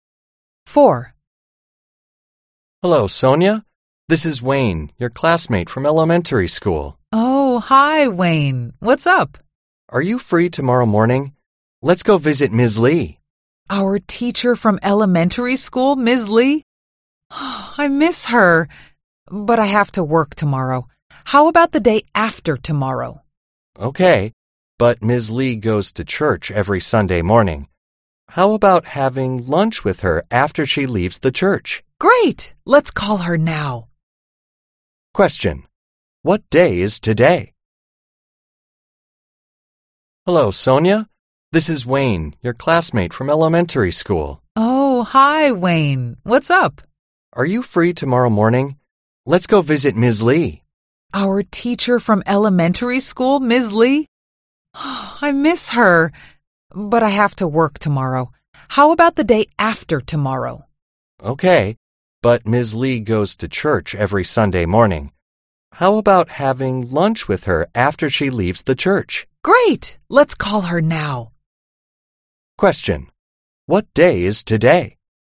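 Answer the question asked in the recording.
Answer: Friday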